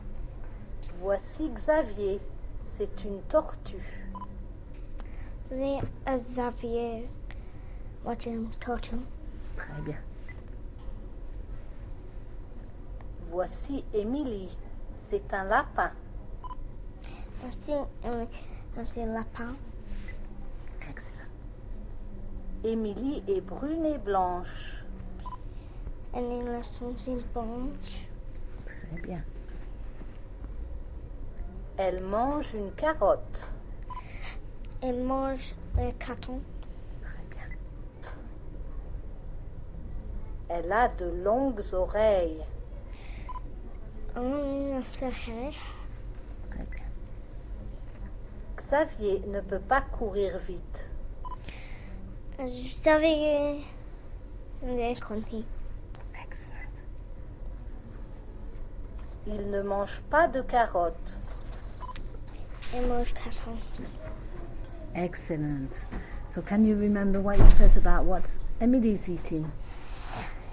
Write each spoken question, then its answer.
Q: So can you remember what it says about what Emily is eating?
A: He's eating a carrot.